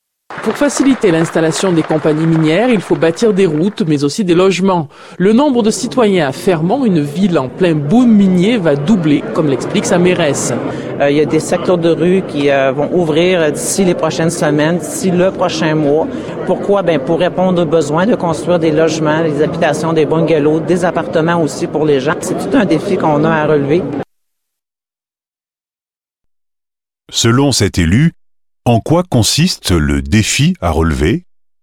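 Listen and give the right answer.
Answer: Construire des logements (habitations, bungalows, appartements) pour une population qui va doubler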